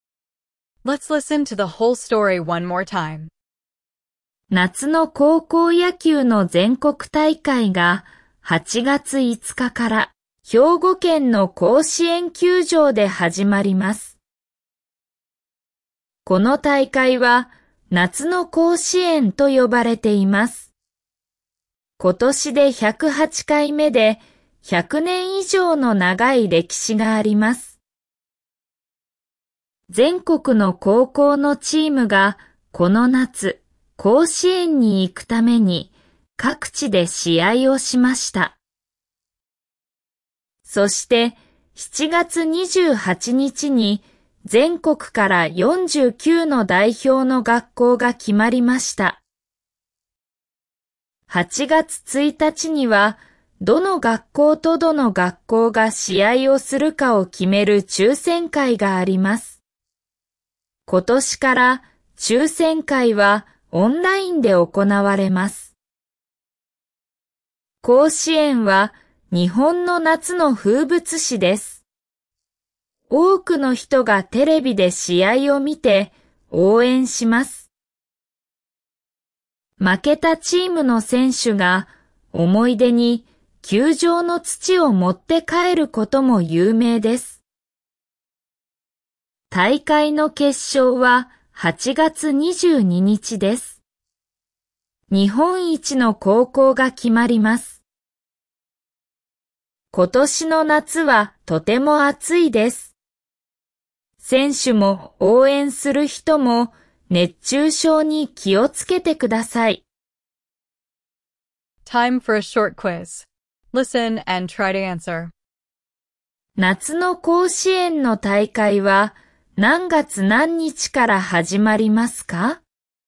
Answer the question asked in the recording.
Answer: August 5th. That is when the games begin at the stadium in Hyogo.